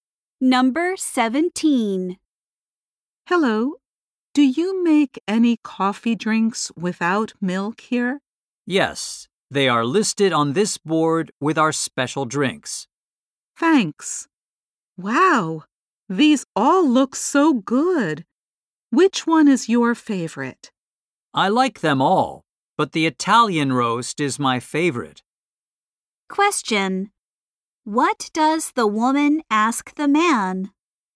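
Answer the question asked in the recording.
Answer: Whether they make coffee drinks without milk.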